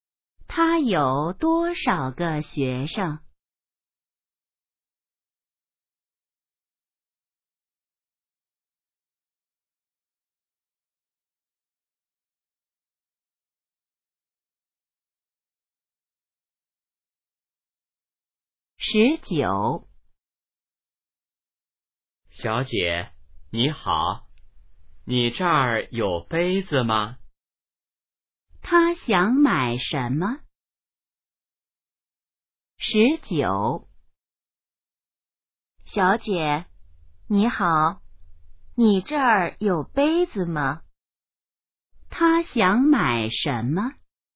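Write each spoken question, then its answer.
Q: 他想买什么?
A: 杯子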